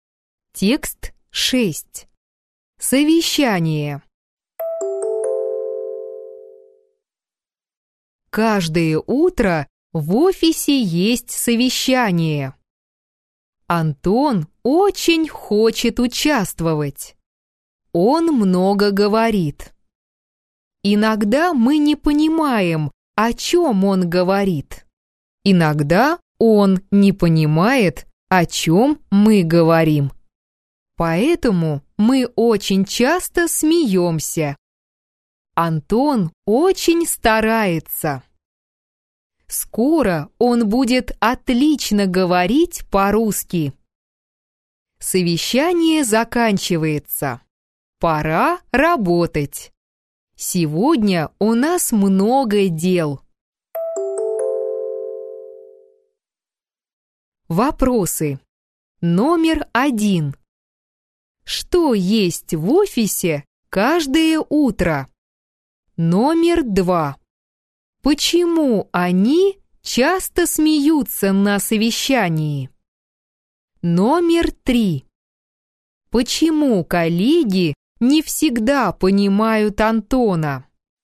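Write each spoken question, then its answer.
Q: Что есть в офисе каждое утро?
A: Совещание

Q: Почему они часто смеются на совещании?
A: Потому что иногда они не понимают Антона, а он не понимает их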